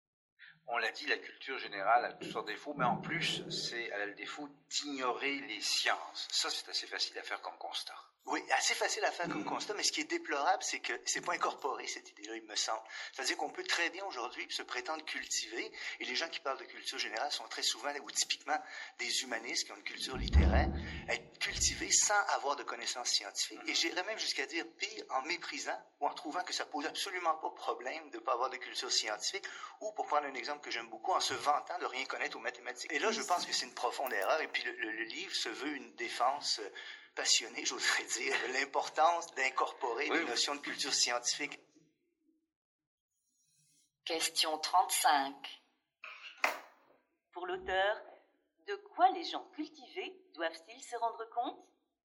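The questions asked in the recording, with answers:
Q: Pour l'auteur, de quoi les gens cultivés doivent-ils se rendre compte?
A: Que la culture générale doit inclure des connaissances scientifiques; ignorer les sciences est une profonde erreur.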